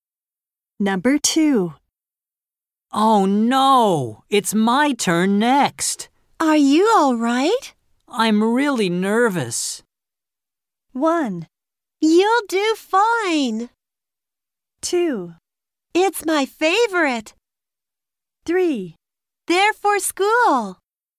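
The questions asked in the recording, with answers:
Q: I'm really nervous.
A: 1: You'll do fine!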